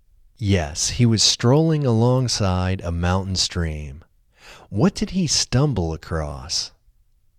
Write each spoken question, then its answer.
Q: What did he stumble across?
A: He stumbled across a breathtaking view.